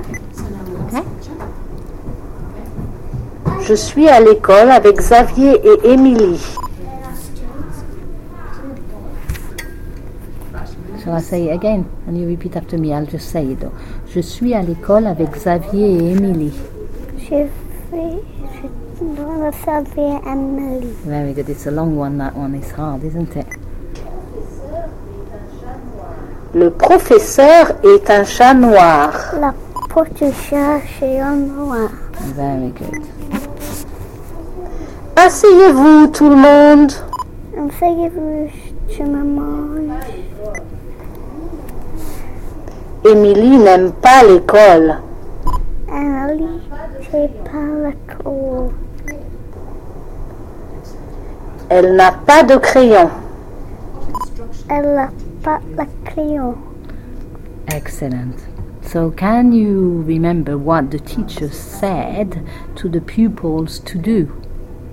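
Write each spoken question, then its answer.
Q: So can you remember what the teacher said to the pupils to do?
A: Sit down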